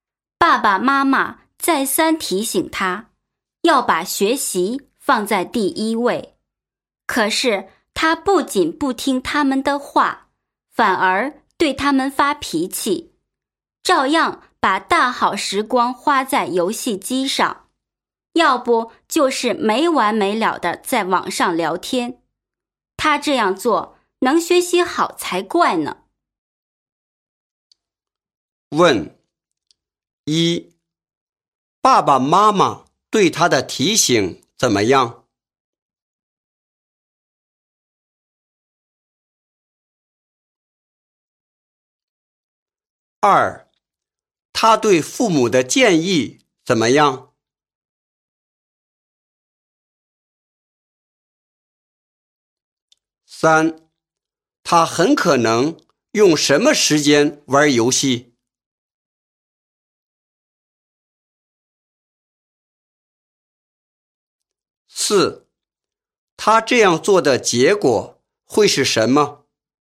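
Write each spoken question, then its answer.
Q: 爸爸妈妈对他的提醒怎么样?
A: 再三提醒他要把学习放在第一位

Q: 他对父母的建议怎么样?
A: 不听,反而对他们发脾气

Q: 他这样做的结果会是什么?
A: 学习不会好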